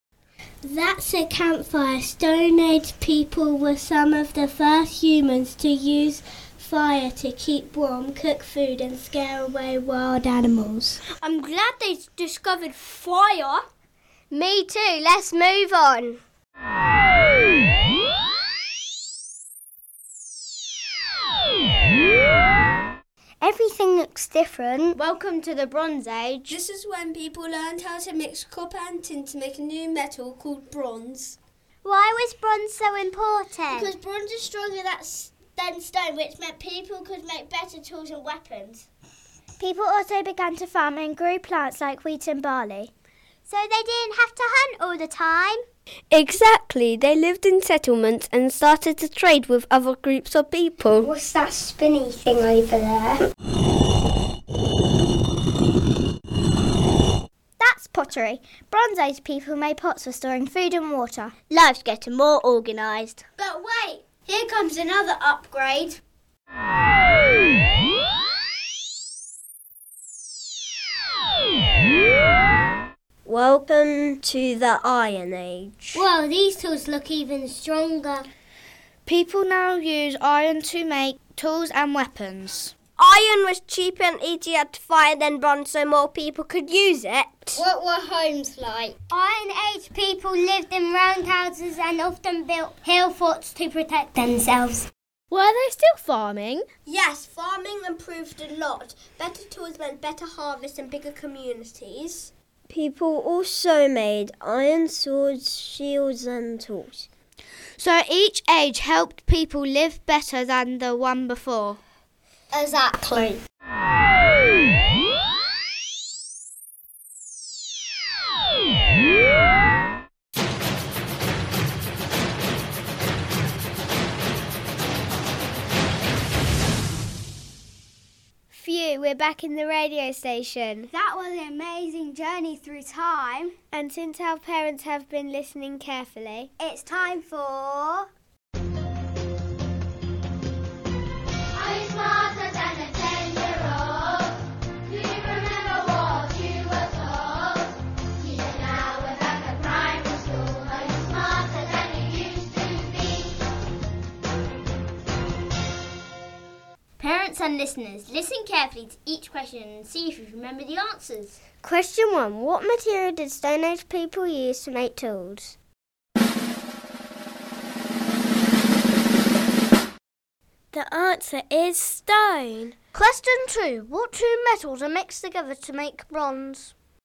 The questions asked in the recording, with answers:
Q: What two metals are mixed together to make bronze?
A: The answer is copper and tin.